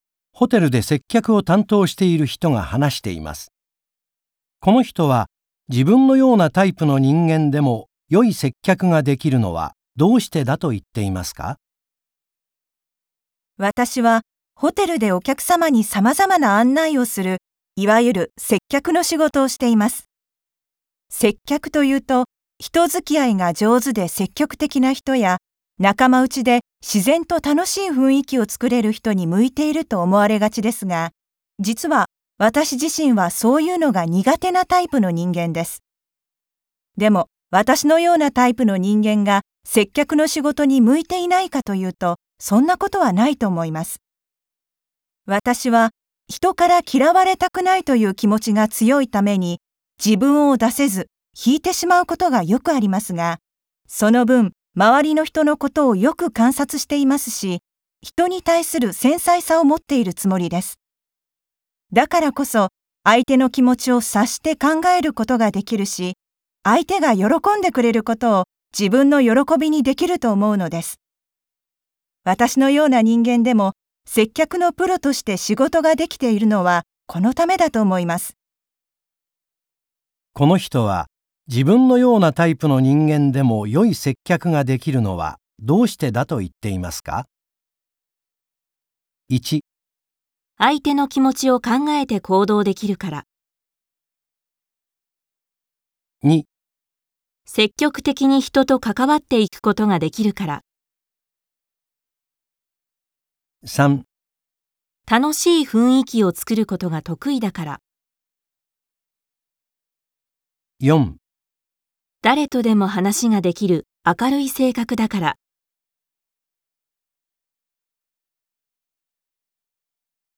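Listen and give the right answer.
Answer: 1: 相手の気持ちを考えて行動できるから。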